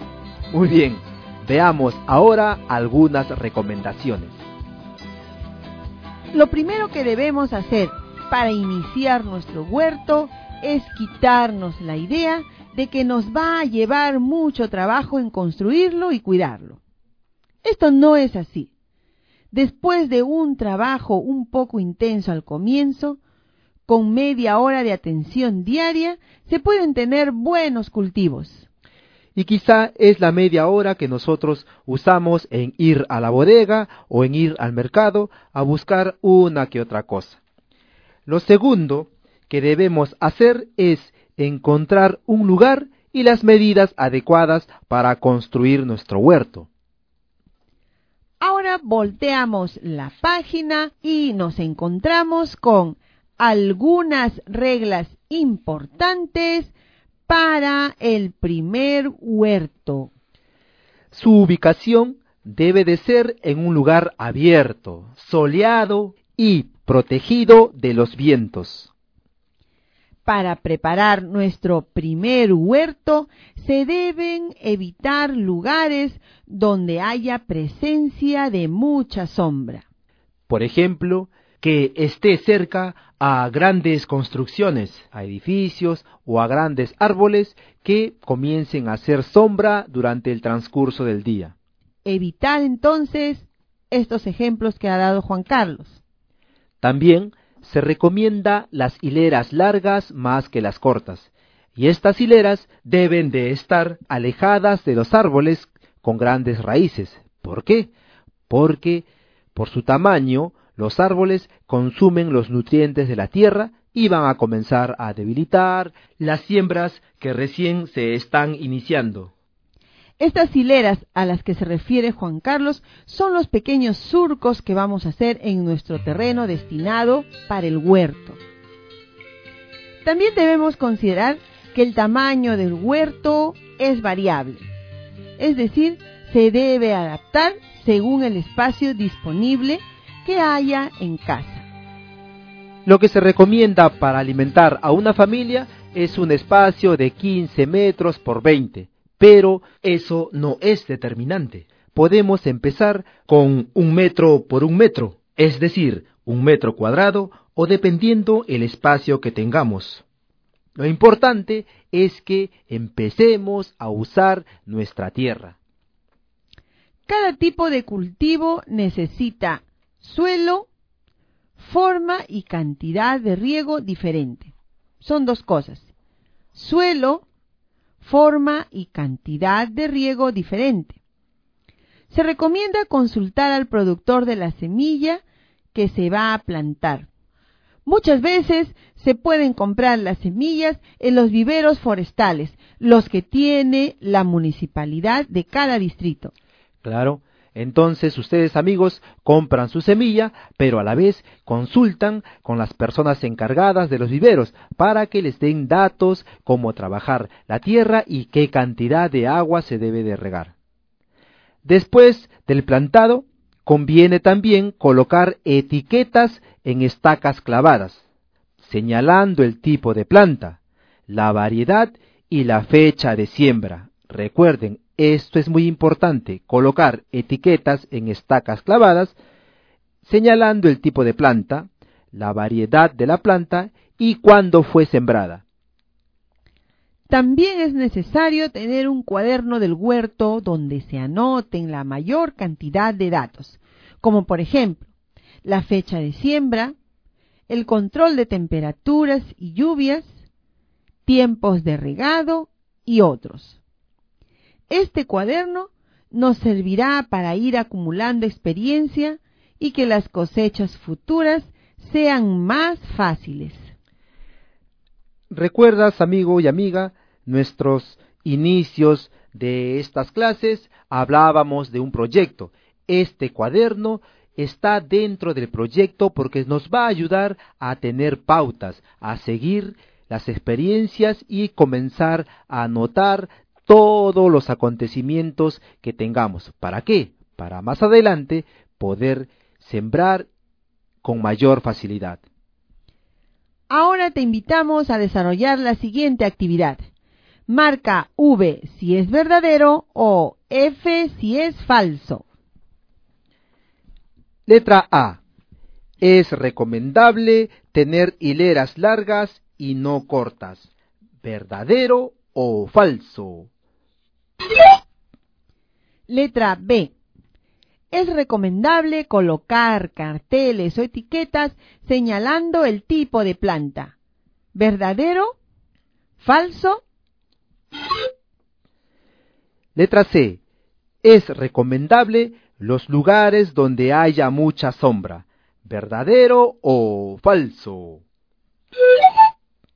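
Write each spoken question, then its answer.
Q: Letra A. Es recomendable tener hileras largas y no cortas.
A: Verdadero

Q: Letra B. Es recomendable colocar carteles o etiquetas señalando el tipo de planta.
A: Verdadero

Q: Letra C. Es recomendable los lugares donde haya mucha sombra.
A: Falso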